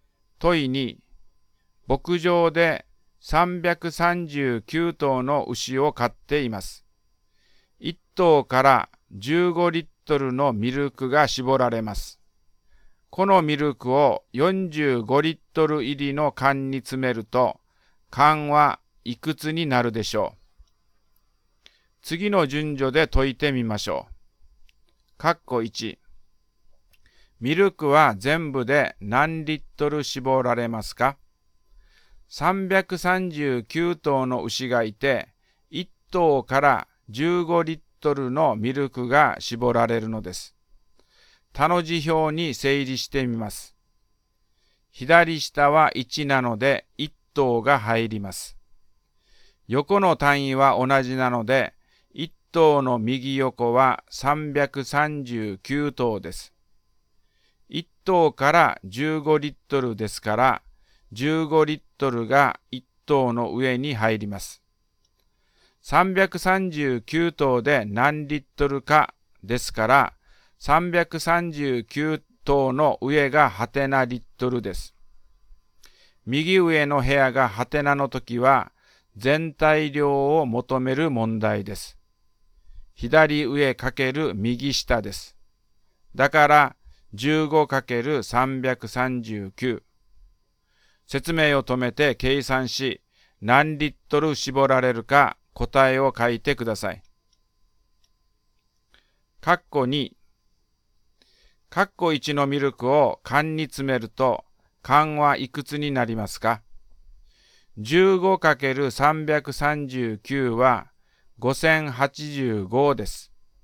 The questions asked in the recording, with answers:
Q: 括弧1。ミルクは全部で何リットル絞られますか?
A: 15×339 は 5085です。